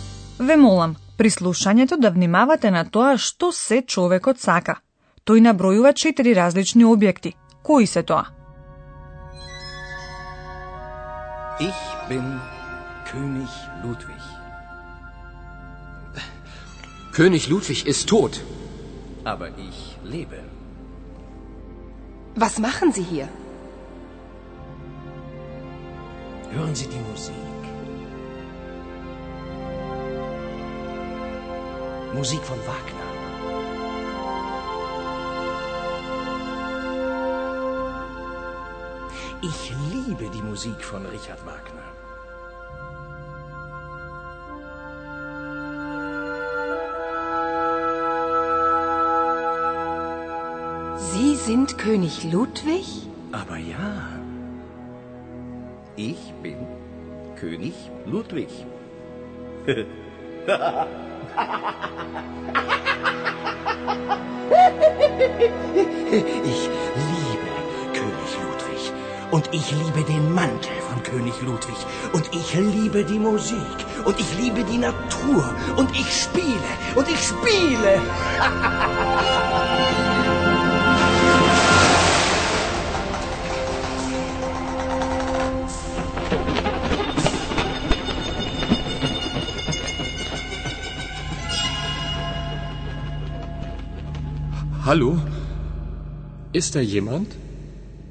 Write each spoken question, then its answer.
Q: Кои се тоа?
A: Сигурно разбравте дека човекот ја сака музиката.